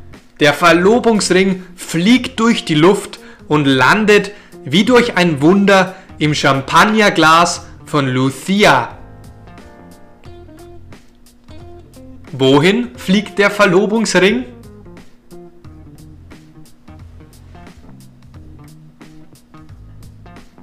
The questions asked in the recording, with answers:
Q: Wohin fliegt der Verlobungsring?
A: Der Verlobungsring fliegt durch die Luft.